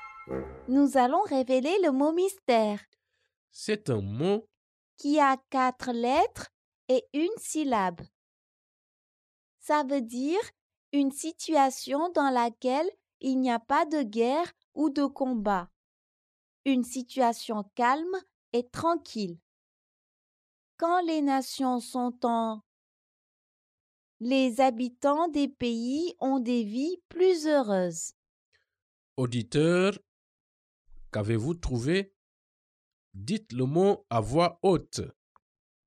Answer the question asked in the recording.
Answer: Le mot mystère est... P. P.